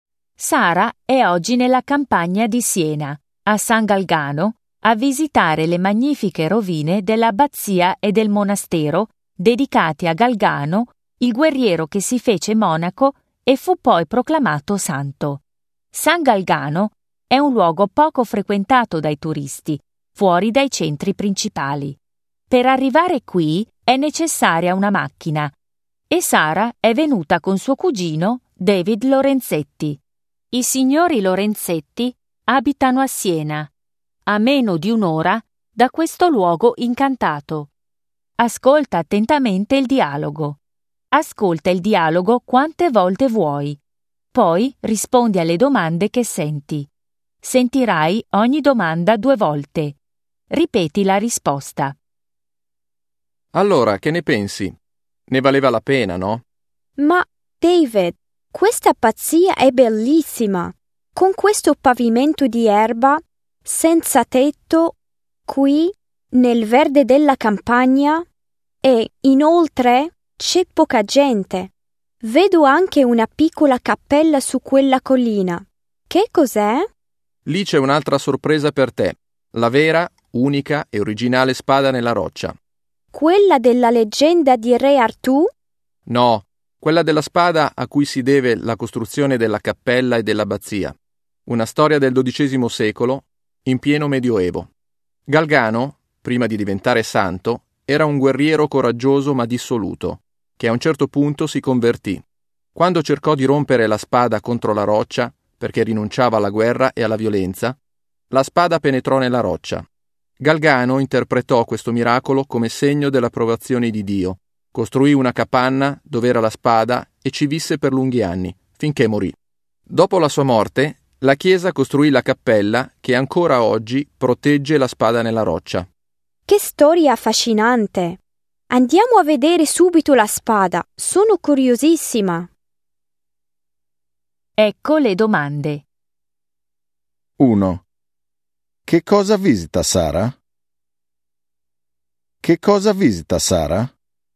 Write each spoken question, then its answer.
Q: Che cosa visita Sara?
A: Visita l'abbazia di San Galgano.